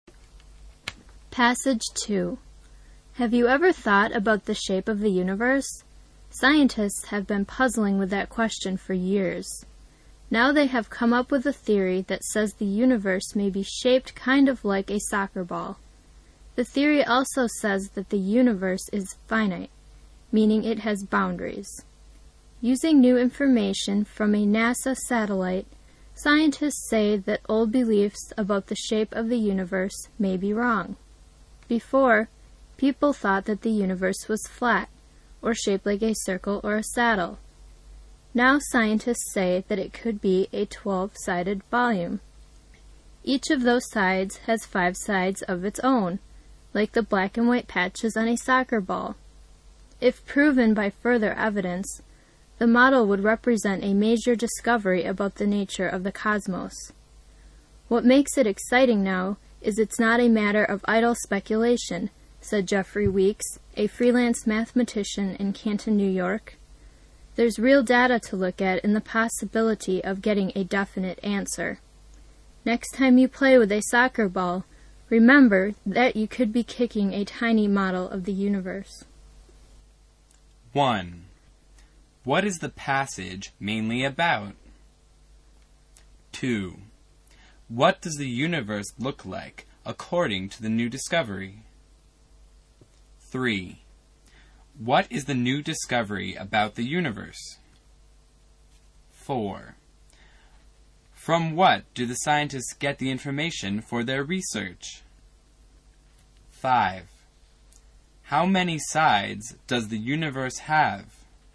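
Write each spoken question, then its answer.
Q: What is the passage mainly about?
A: A new theory about the shape of the universe

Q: What does the universe look like according to the new discovery?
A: Like a soccer ball

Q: From what do the scientists get the information for their research?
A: A NASA satellite

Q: How many sides does the universe have?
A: 12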